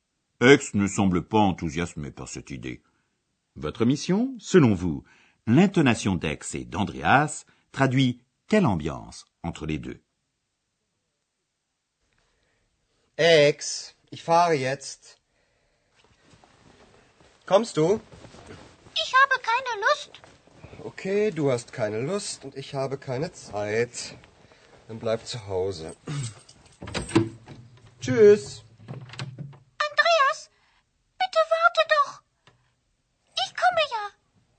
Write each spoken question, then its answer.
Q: selon vous, l'intonation d'Ex et d'Andreas traduit quelle ambiance entre les deux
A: Oui, vous avez bien remarqué que Ex n'a guère envie et qu'Andreas est assez énervé.